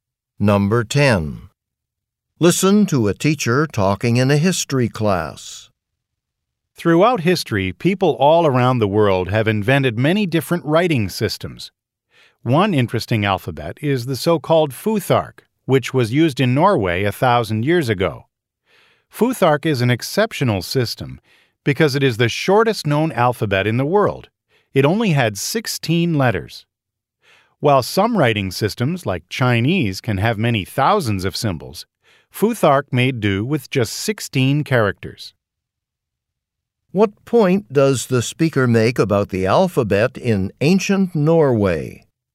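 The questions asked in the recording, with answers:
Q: What point does the speaker make about the alphabet in ancient Norway?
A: It is the shortest known alphabet, with only 16 letters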